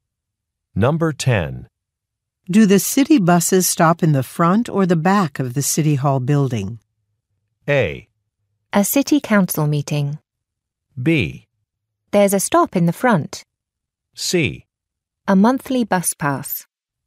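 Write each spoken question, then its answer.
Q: Do the city buses stop in the front or the back of the City Hall building?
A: B: There's a stop in the front.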